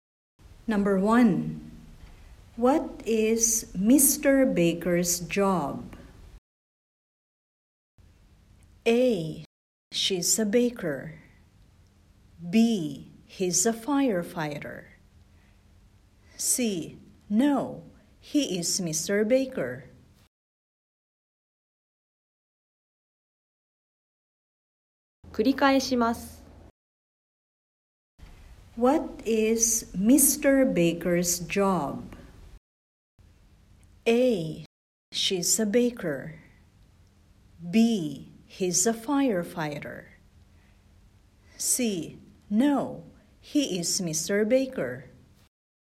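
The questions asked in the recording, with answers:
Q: What is Mr. Baker's job?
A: B: He's a firefighter.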